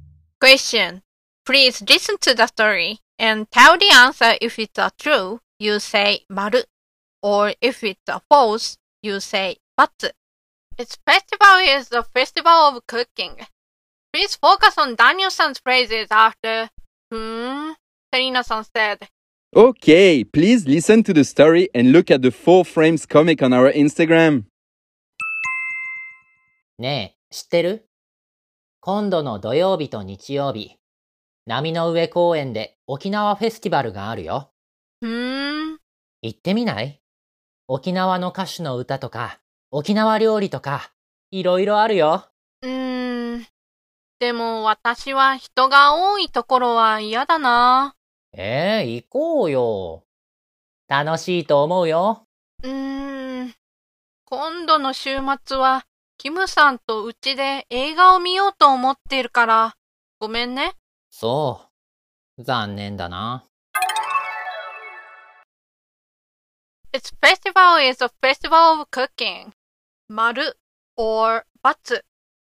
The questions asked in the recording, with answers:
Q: Its festival is the festival of cooking.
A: Then the answer is but